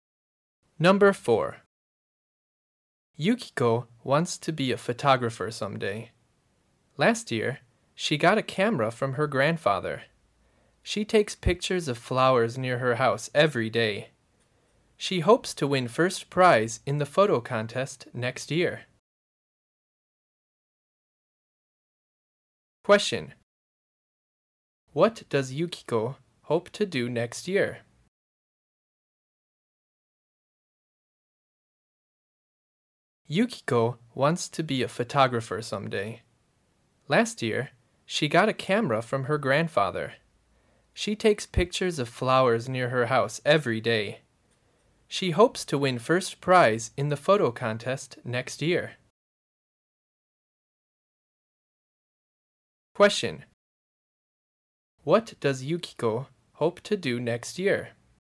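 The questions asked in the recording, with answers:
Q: What does Yukiko hope to do next year?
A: Win first prize in the photo contest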